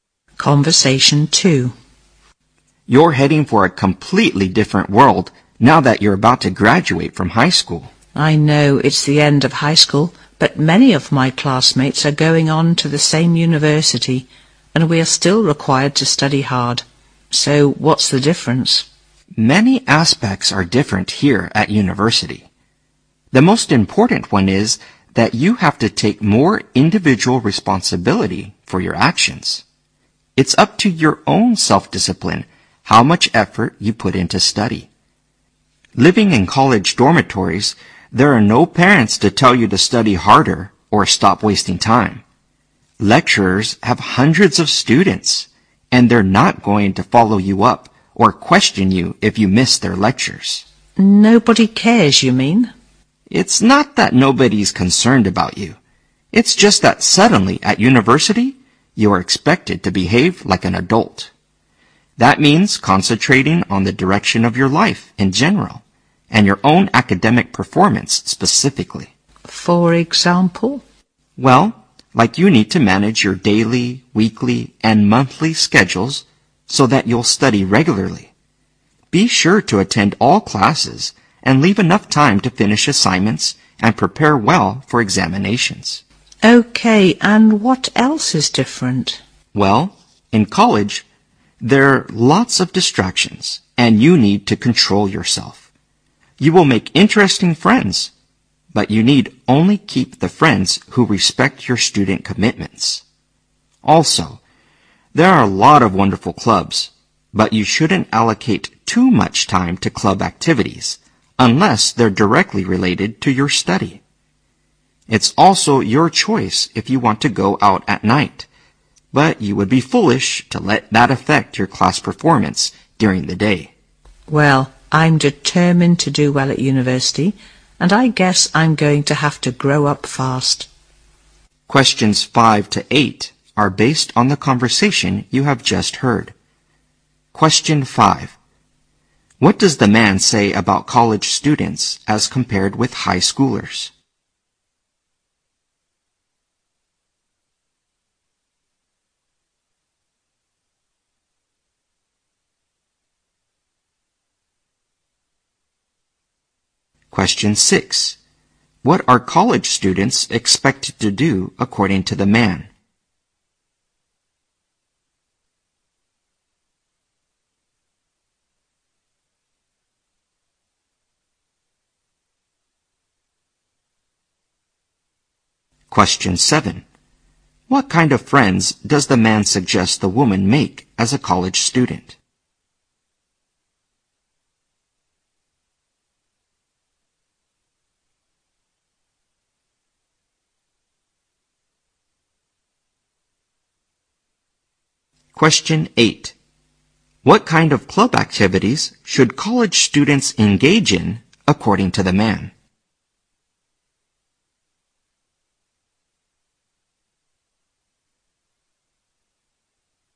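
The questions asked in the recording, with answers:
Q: What does the man say about college students as compared with high schoolers?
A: They have to take more individual responsibility for their actions

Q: What are college students expected to do according to the man?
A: Behave like adults

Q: What kind of friends does the man suggest the woman make as a college student?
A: Friends who respect her student commitments

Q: What kind of club activities should college students engage in, according to the man?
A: Those directly related to their study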